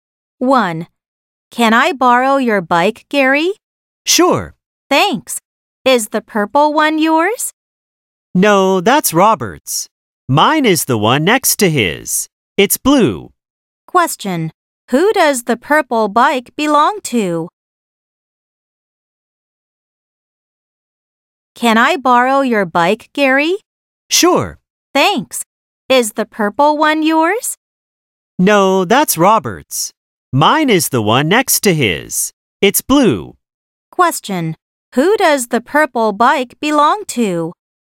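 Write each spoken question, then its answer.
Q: Who does the purple bike belong to?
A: Robert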